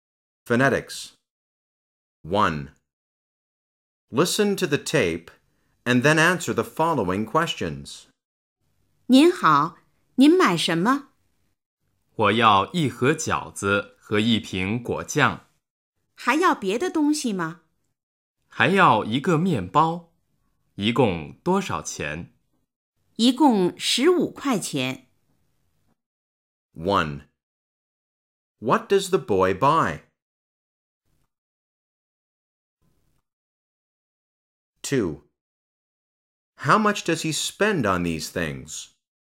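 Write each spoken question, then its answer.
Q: What does the boy buy?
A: A box of dumplings, a bottle of jam and a loaf of bread

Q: How much does he spend on these things?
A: 15 yuan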